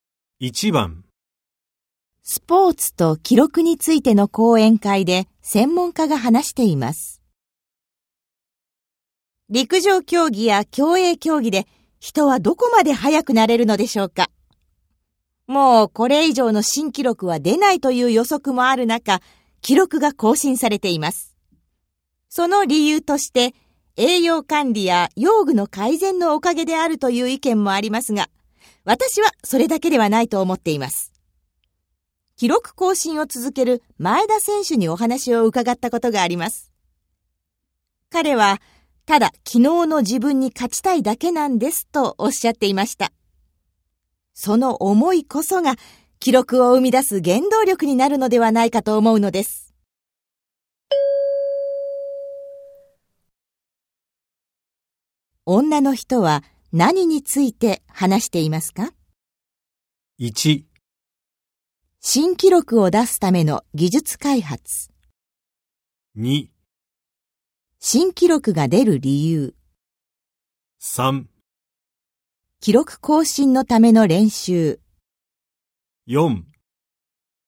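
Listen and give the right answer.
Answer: 2: 新記録が出る理由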